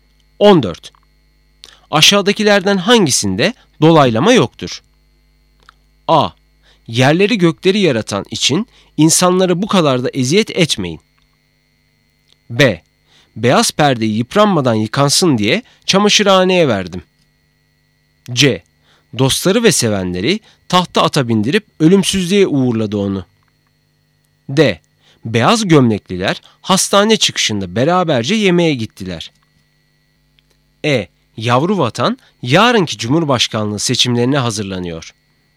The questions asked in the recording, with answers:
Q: Aşağıdakilerden hangisinde dolaylama yoktur?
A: Doğru cevap B.